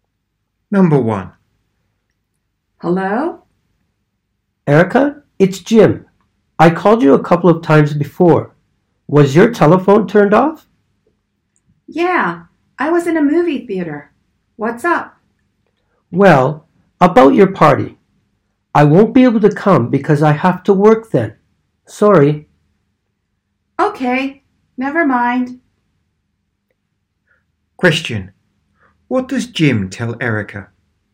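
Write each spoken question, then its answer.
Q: What does Jim tell Erica?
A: He can't come to her party because he has to work.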